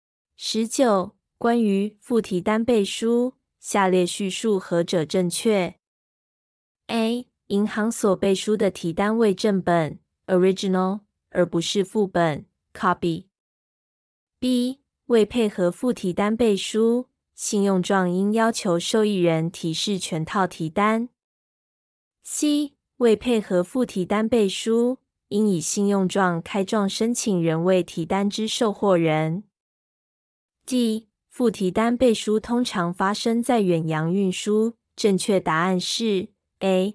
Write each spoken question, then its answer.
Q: 关于附提单背书,下列叙述何者正确 ?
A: 正确答案是 A.